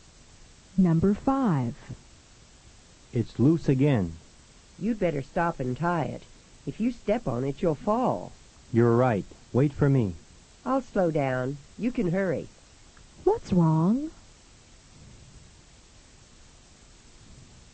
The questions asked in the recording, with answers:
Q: What's wrong?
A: Number 5 is B. His shoelace is loose.